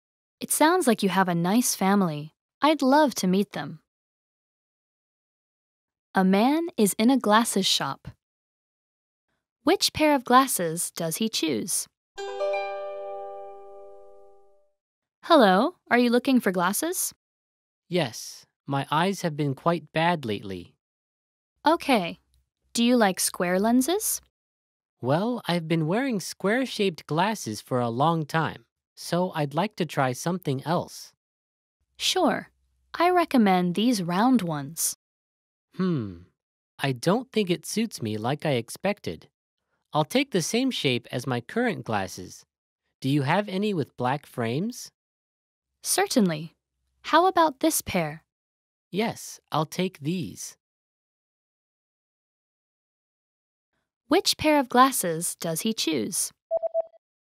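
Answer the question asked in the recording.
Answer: Square glasses with black frames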